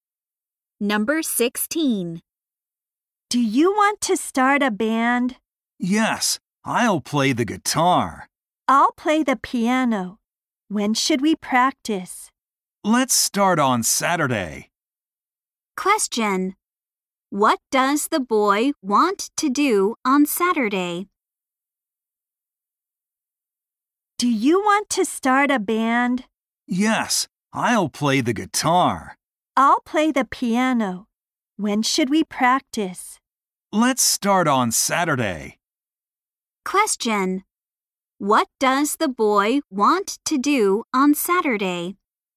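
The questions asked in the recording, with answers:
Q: What does the boy want to do on Saturday?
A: Start practicing with the band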